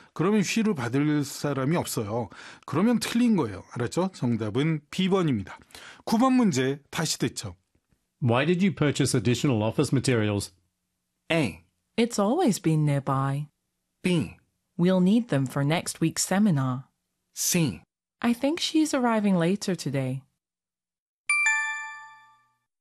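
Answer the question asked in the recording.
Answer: B: We'll need them for next week's seminar.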